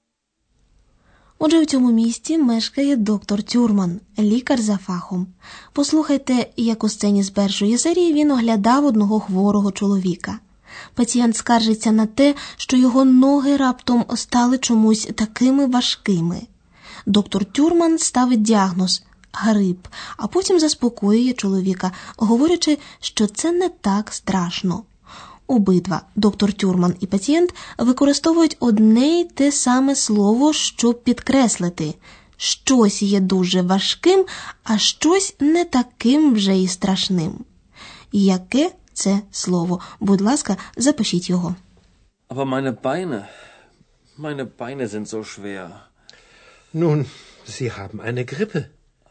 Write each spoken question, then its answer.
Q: Яке це слово?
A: правильною відповіддю на останнє запитання буде маленьке слово зо.